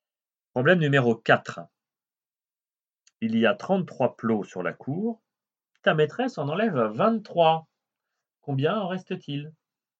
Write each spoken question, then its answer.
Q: Combien en reste-t-il?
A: Il en reste 10.